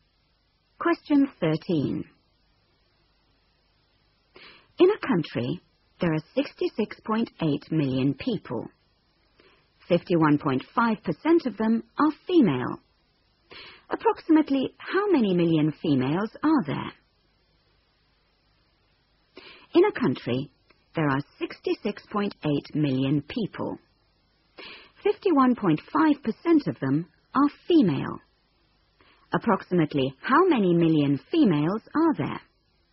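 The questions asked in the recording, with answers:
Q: Approximately how many million females are there?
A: about 34 million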